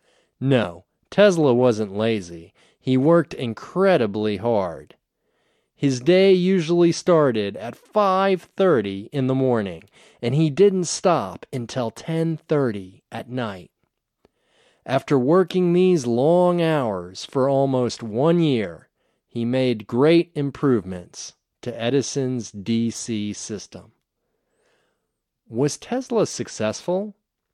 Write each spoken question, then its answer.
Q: Was Tesla successful?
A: Yes, he was successful. He made great improvements to Edison's DC system.